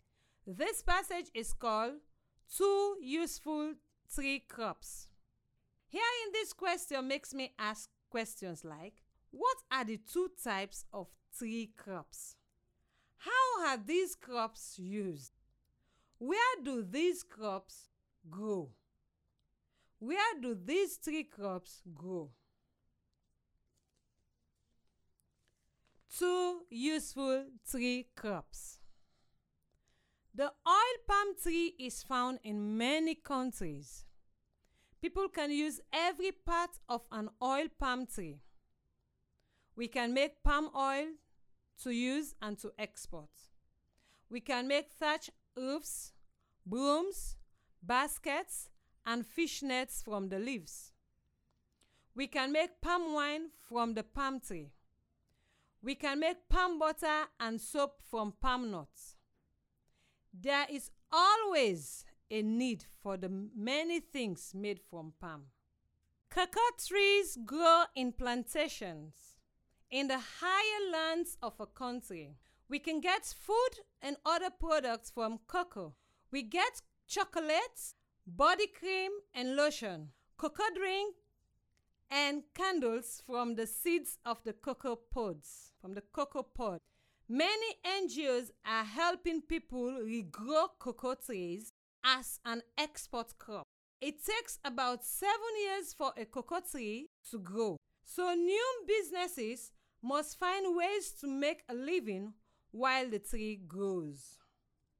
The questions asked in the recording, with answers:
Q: How are these crops used?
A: We can make palm oil to use and to export.

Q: Where do these tree crops grow?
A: The oil palm tree is found in many countries, and cocoa trees grow in plantation in the higher land of a country.